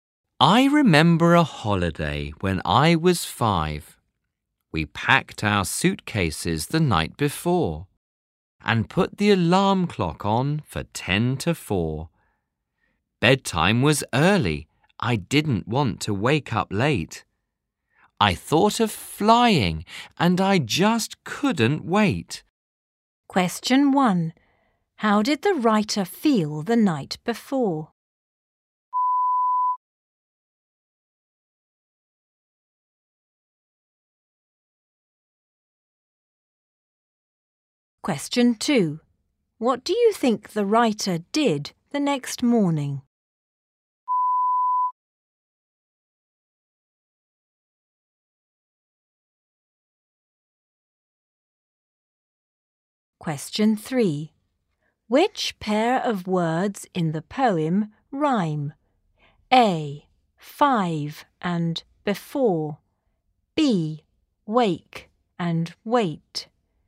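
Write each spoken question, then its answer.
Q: How did the writer feel the night before?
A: Excited; couldn't wait

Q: Which pair of words in the poem rhyme?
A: D: Late and wait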